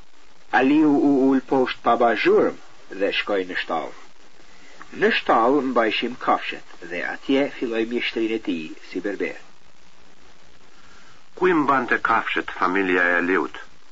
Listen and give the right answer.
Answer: Familja e Aliut i mbante kafshet në shtall.